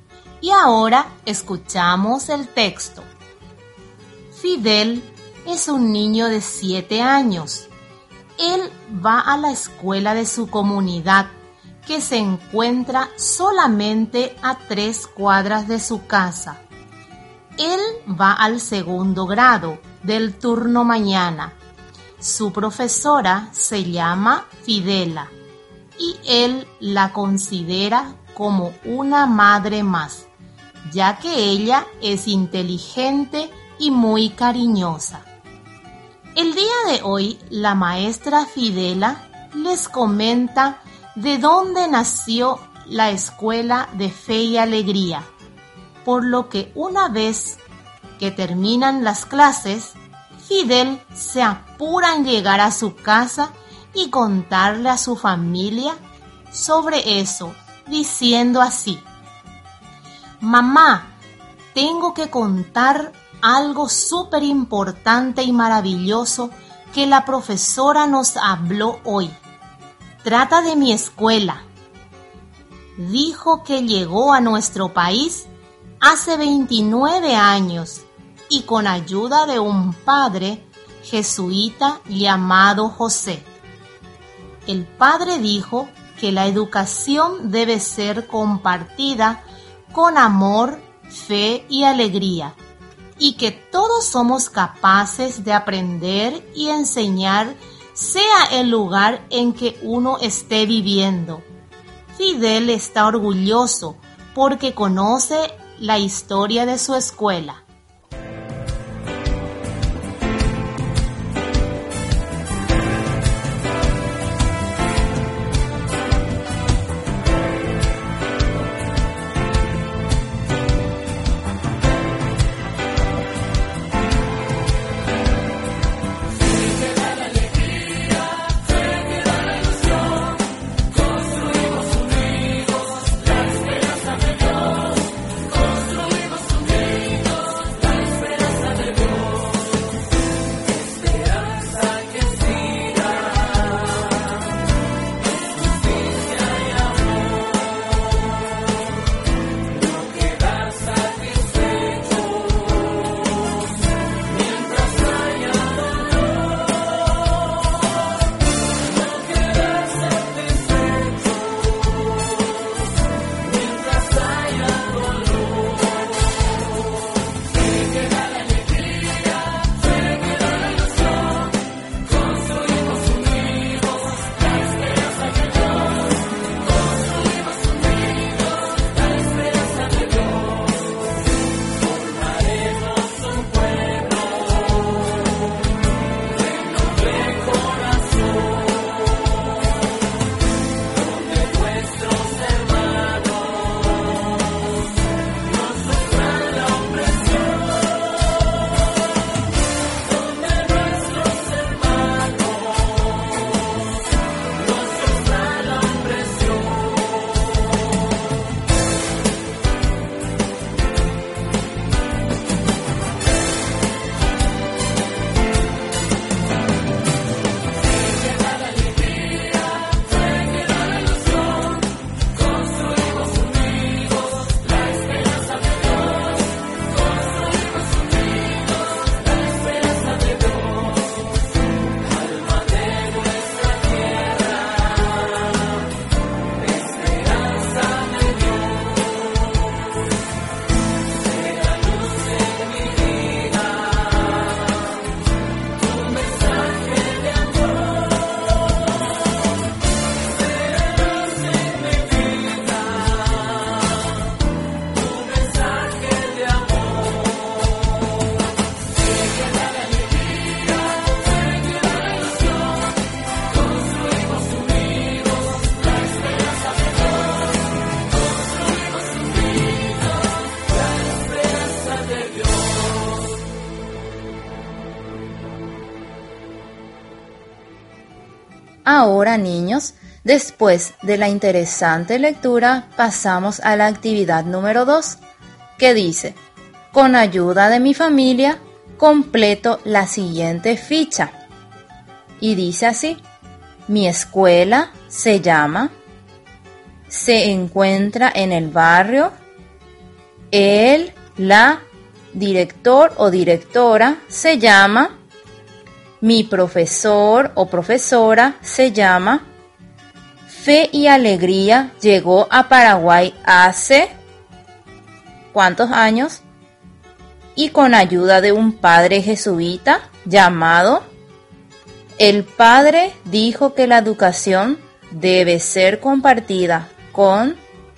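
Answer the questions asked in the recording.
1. hace 29 años
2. José
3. amor, fe y alegría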